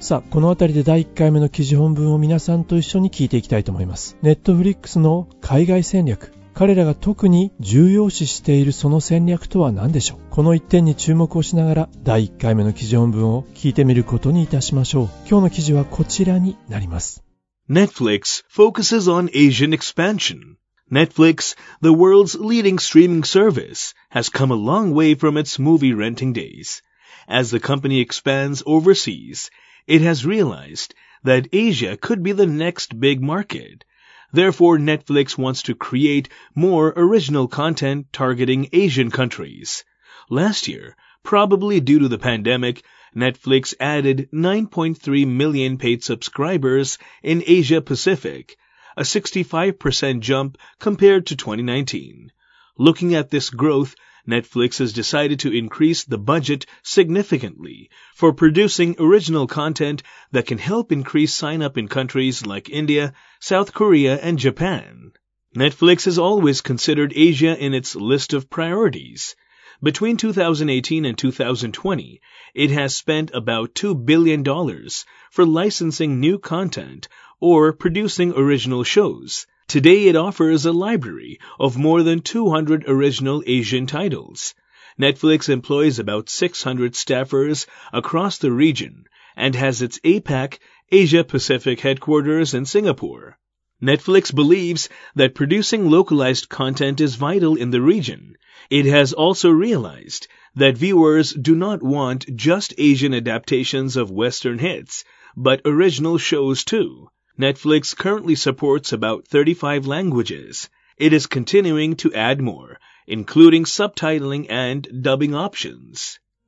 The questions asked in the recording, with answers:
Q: Netflix の海外戦略、彼らが特に重要視しているその戦略とは何でしょう。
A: Netflix believes that producing localized content is vital in the region.